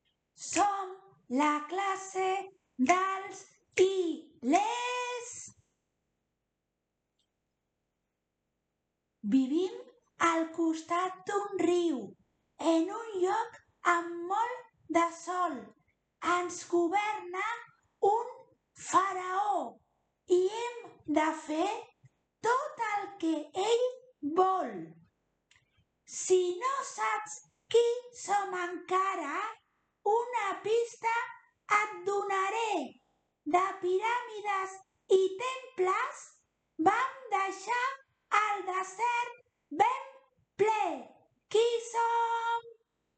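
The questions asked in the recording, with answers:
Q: Qui som?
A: Els egipcis (antics egipcis)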